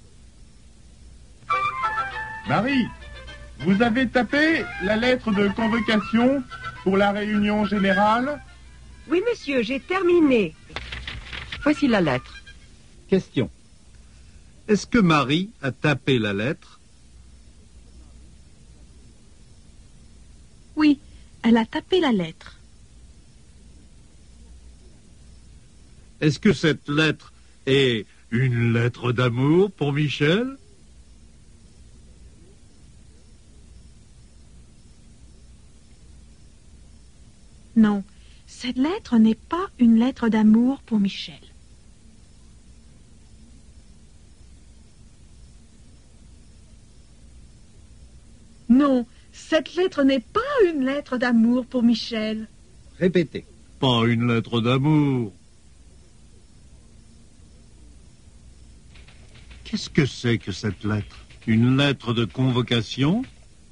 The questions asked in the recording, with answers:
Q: Est-ce que Marie a tapé la lettre?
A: Oui, elle a tapé la lettre.

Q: Est-ce que cette lettre est une lettre d'amour pour Michel?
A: Non, cette lettre n'est pas une lettre d'amour pour Michel.

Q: Qu'est-ce que c'est que cette lettre?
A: Oui, c'est une lettre de convocation.